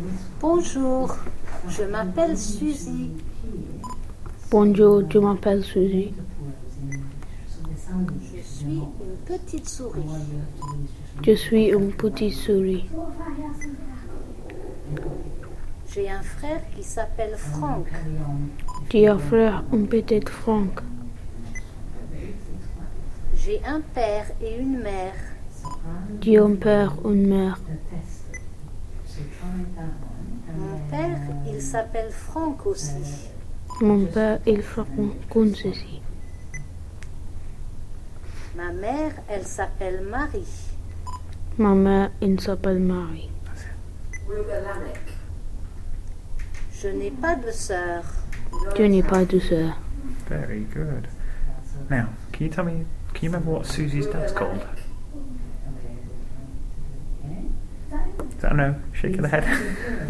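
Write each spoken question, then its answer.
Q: can you remember what Susie's dad's called?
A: Franck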